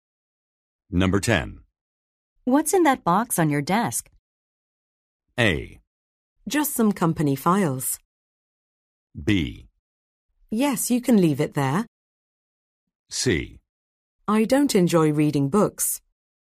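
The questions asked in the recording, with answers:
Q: What's in that box on your desk?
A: A: Just some company files.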